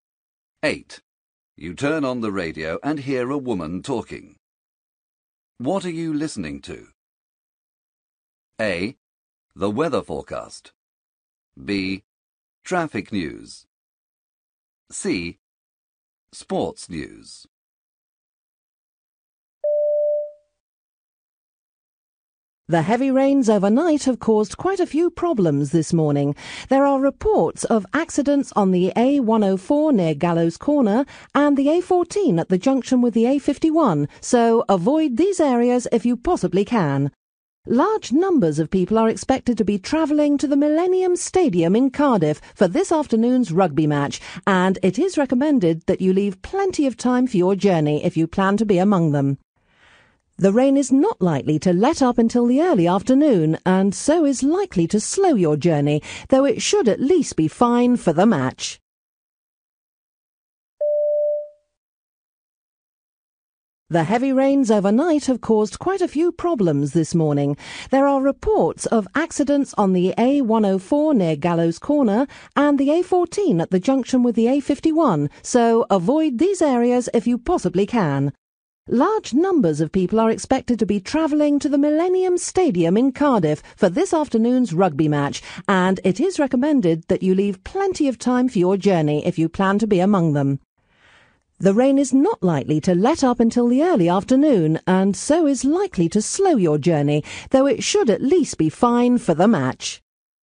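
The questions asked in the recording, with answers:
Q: What are you listening to?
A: B: Traffic news.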